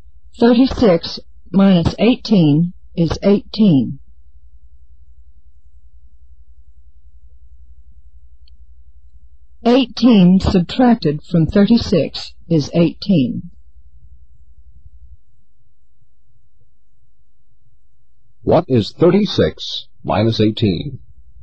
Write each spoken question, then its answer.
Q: 36 minus 18?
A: 18.